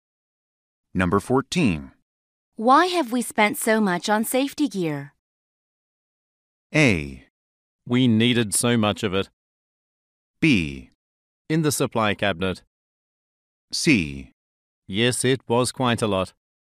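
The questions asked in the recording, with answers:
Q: Why have we spent so much on safety gear?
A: A: We needed so much of it.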